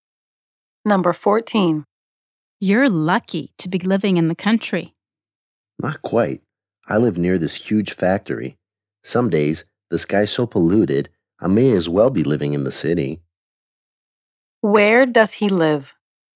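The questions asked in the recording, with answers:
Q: Where does he live?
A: in the country near a huge factory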